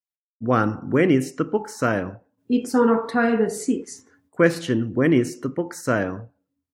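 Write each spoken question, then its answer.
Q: When is the book sale?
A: On October 6th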